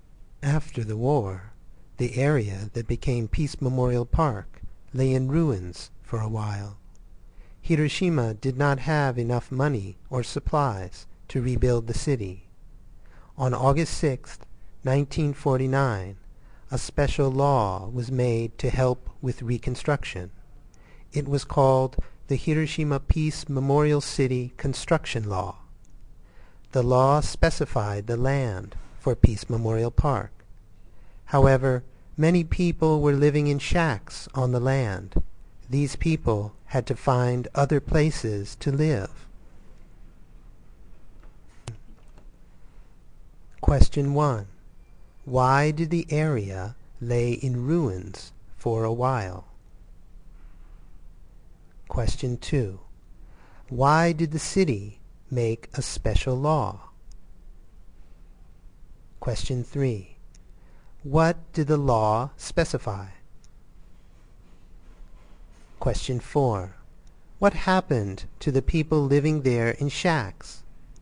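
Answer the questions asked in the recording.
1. Hiroshima did not have enough money or supplies to rebuild the city.
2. To help with reconstruction.
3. The land for Peace Memorial Park.
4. They had to find other places to live.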